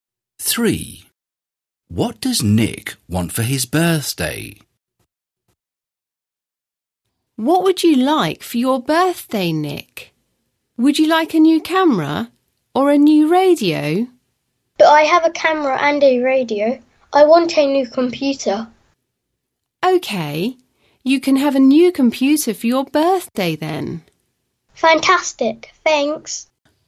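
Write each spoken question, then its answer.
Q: What does Nick want for his birthday?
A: a new computer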